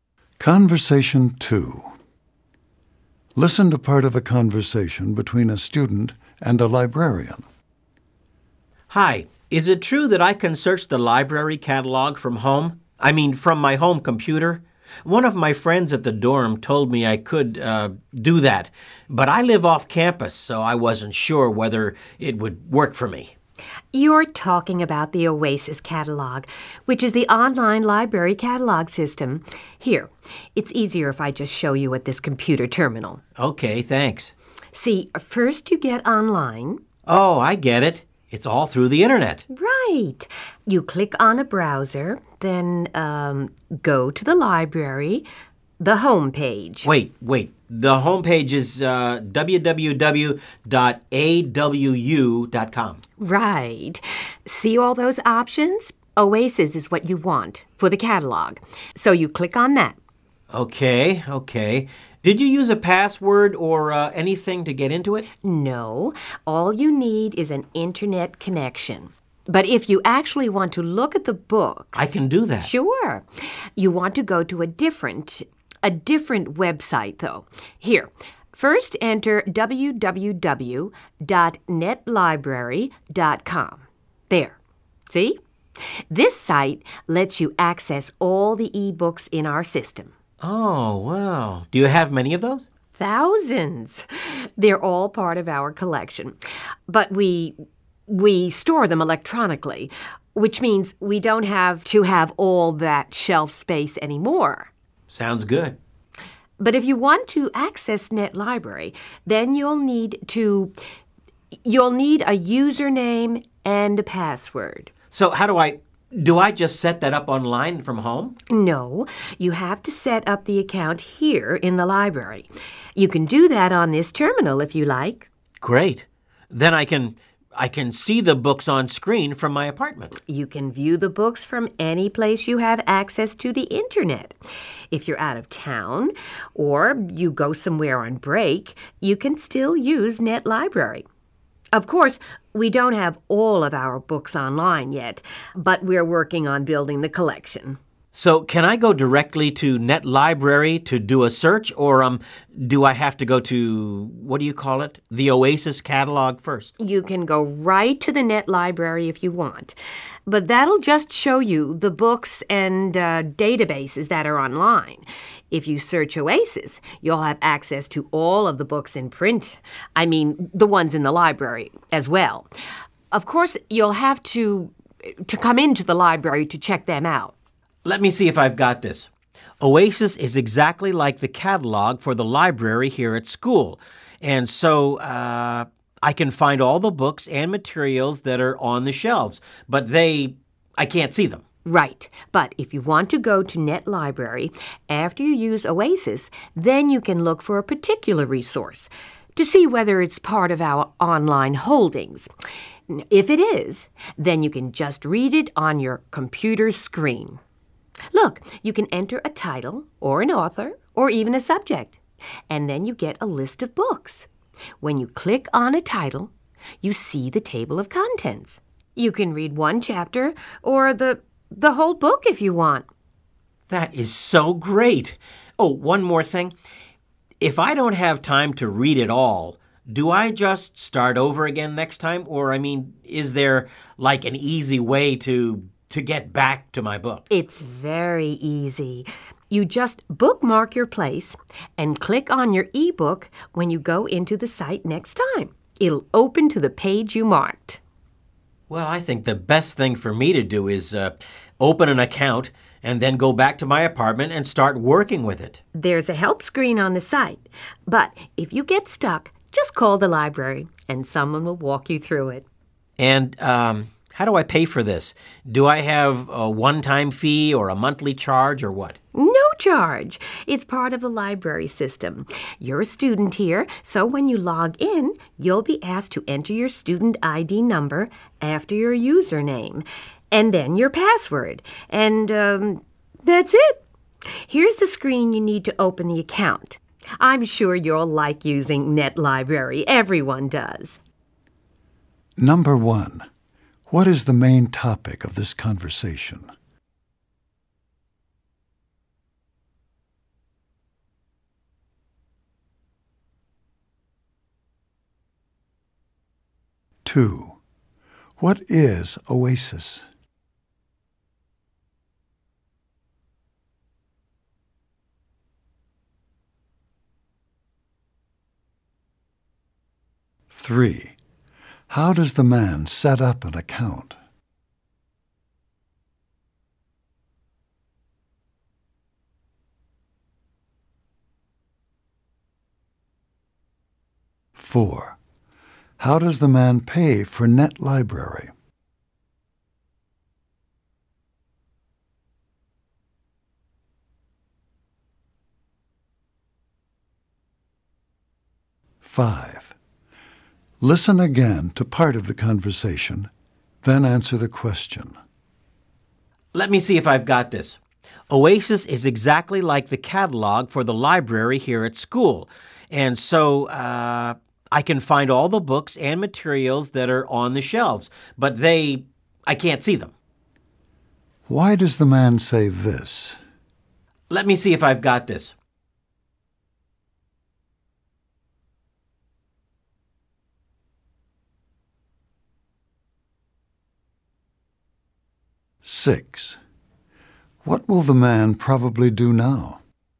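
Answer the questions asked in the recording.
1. How to use the library's online catalog and e-books from home
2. The library's online catalog system
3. At a terminal in the library
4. He doesn't; there is no charge for students
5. To check that he understands correctly
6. Open an account, then go home and start using it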